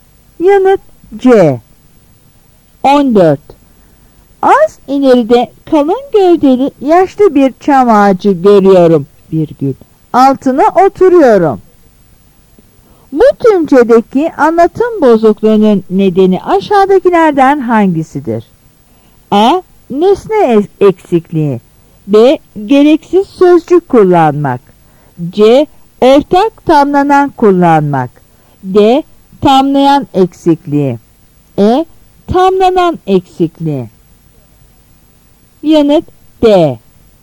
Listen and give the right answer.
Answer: Yanıt D.